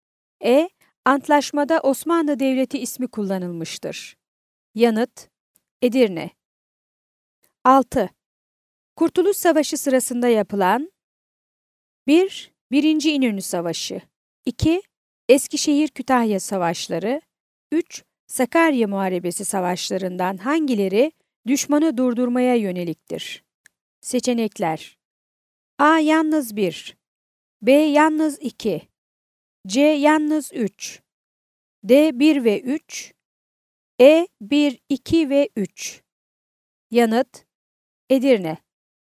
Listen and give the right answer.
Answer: Yanıt: Edirne.